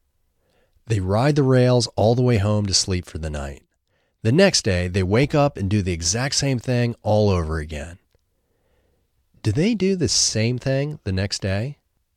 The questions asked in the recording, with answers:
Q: Do they do the same thing the next day?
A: Yes, they do the exact same thing the next day.